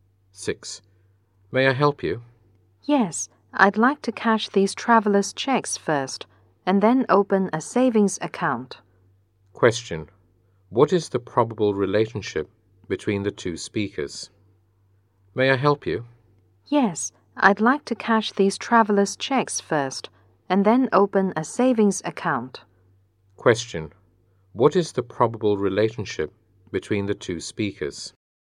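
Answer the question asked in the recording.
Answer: Bank clerk and customer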